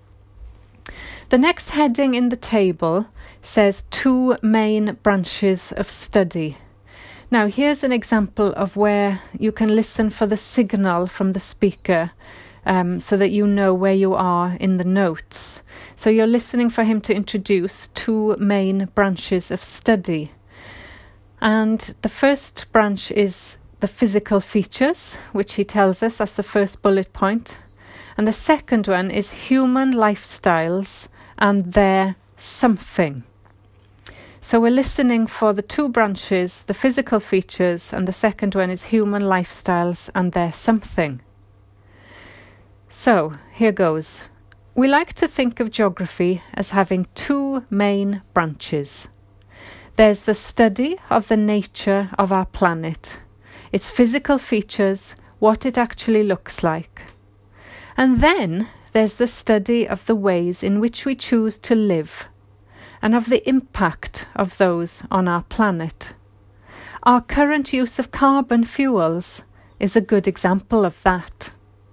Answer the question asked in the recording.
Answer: So the answer is, of course, impact.